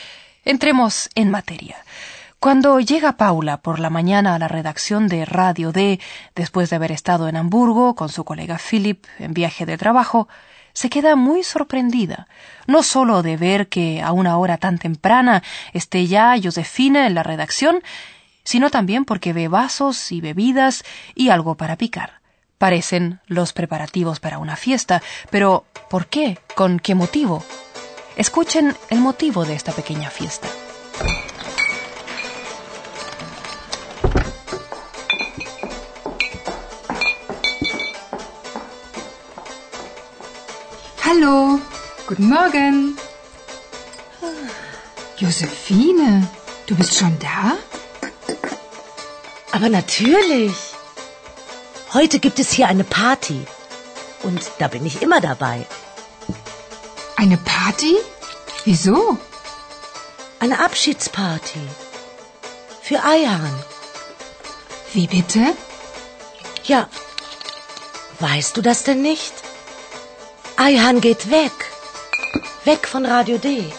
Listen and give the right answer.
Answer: Es una fiesta de despedida porque, lamentablemente, Ayhan se va de Radio D.